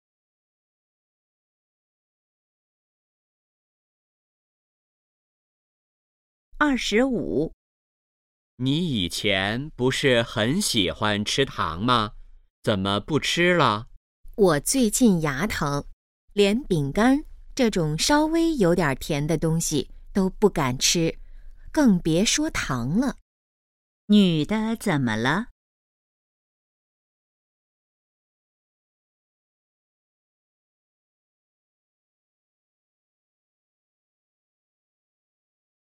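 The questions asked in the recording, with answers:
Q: 女的怎么了?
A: 牙疼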